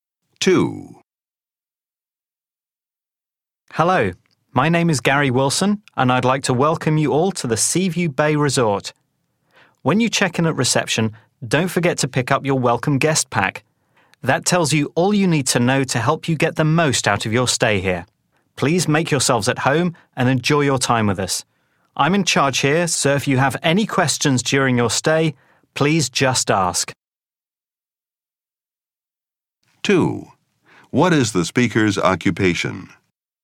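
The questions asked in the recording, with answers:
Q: What is the speaker's occupation?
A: Resort manager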